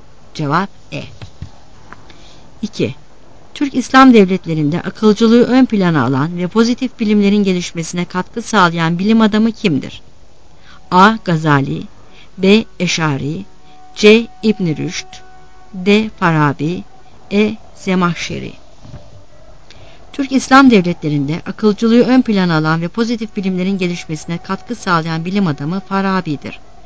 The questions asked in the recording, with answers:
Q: Türk İslam devletlerinde akılcılığı ön plana alan ve pozitif bilimlerin gelişmesine katkı sağlayan bilim adamı kimdir?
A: Cevap D.